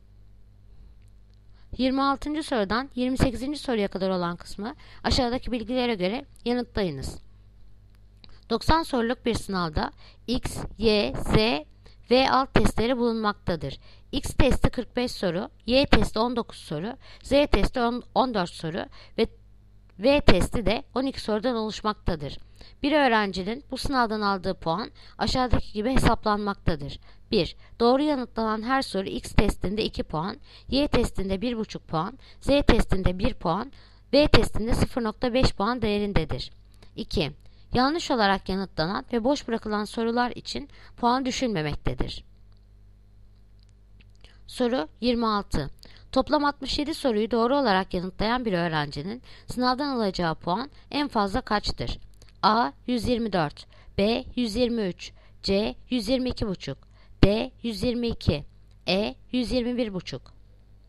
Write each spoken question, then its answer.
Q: Toplam 67 soruyu doğru olarak yanıtlayan bir öğrencinin sınavdan alacağı puan en fazla kaçtır?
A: Yanıt Edirne 121,5.